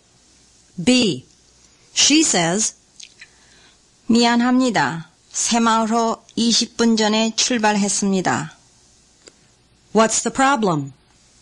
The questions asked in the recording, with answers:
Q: What's the problem?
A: The Seimaul train left 20 minutes ago.